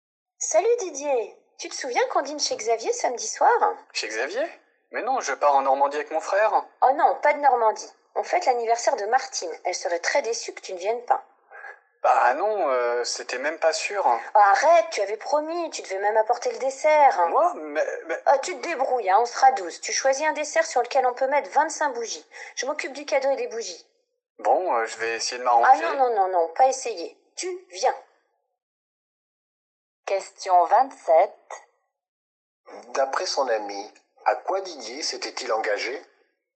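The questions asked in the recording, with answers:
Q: D'après son ami, à quoi Didier s'était-il engagé?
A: À venir au dîner chez Xavier et à apporter le dessert.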